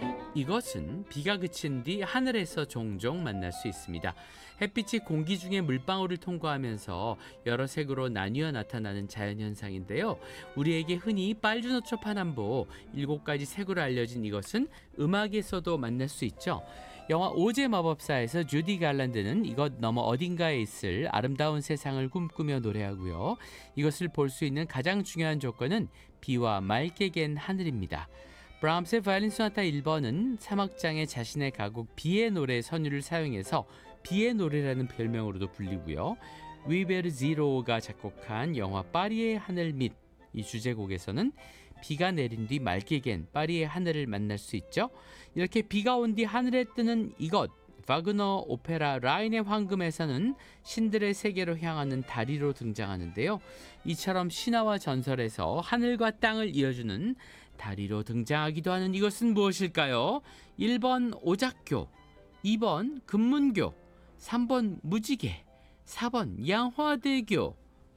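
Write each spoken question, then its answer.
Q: 이처럼 신화와 전설에서 하늘과 땅을 이어주는 다리로 등장하기도 하는 이것은 무엇일까요?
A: 3번: 무지개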